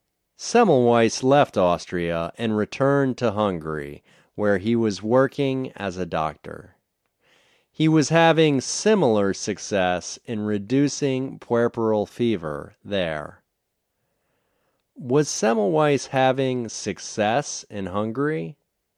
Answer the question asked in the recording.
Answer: Yes, he was having similar success in Hungary.